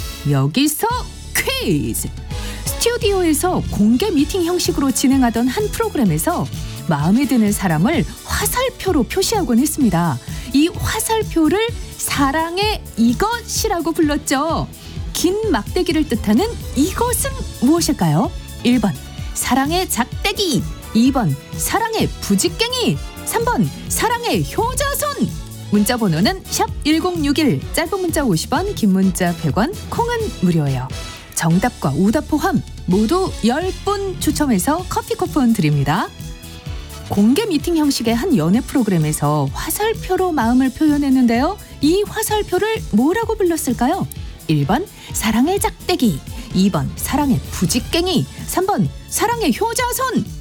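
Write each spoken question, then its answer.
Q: 이 화살표를 뭐라고 불렀을까요?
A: 1번: 사랑의 작대기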